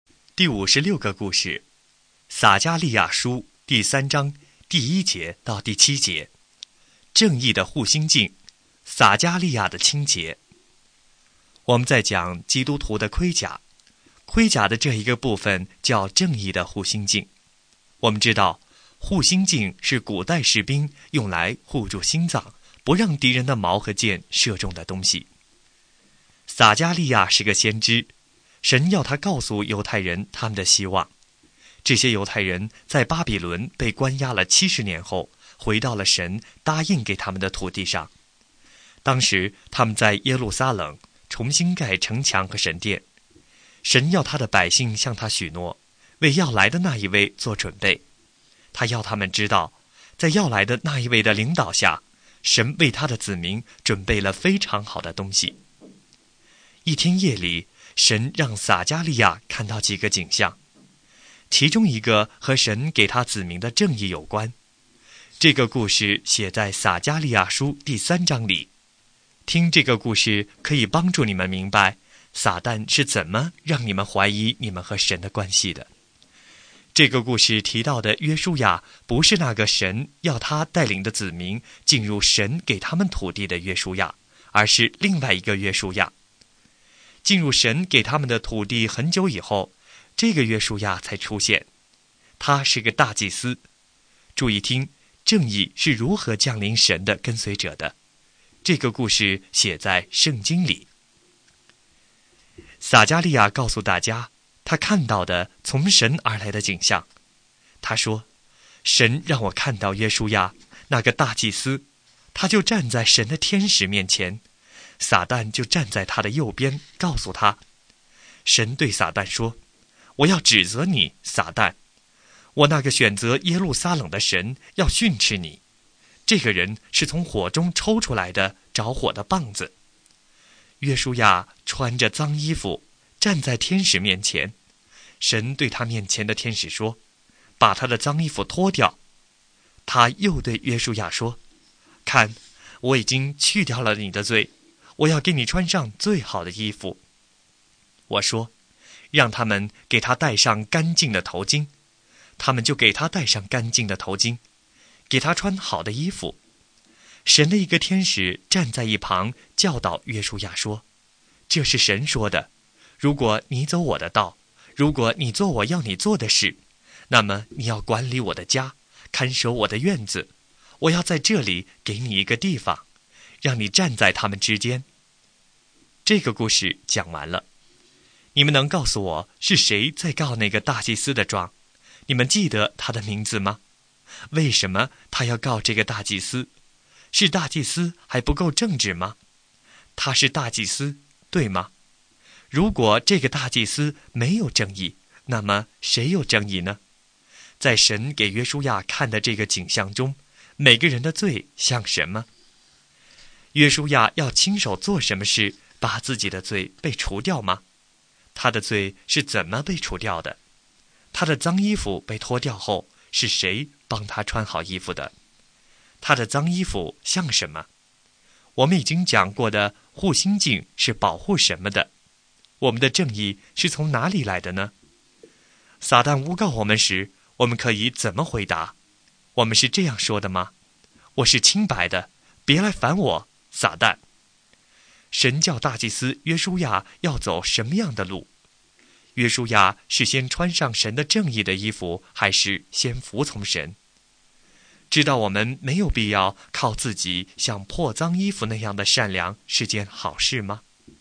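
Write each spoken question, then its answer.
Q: 你们能告诉我是谁在告那个大祭司的状?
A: 撒旦

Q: 我们已经讲过的护心镜是保护什么的?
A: 心脏

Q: 神教大祭司约书亚要走什么样的路?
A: 神的道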